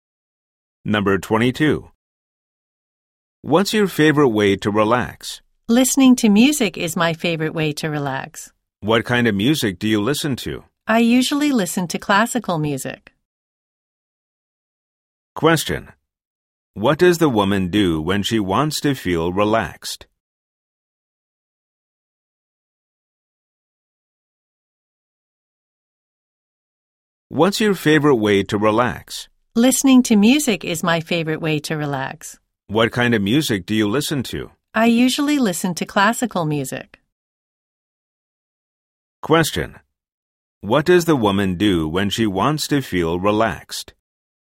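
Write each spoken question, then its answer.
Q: What does the woman do when she wants to feel relaxed?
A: She listens to music, usually classical music.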